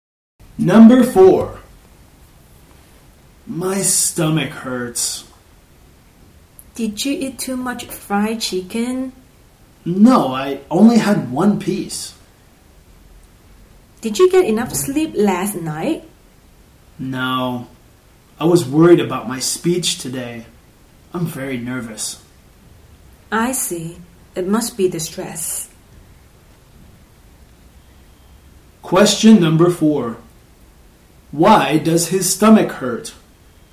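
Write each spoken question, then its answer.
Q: Why does his stomach hurt?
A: Because of stress; he is nervous about his speech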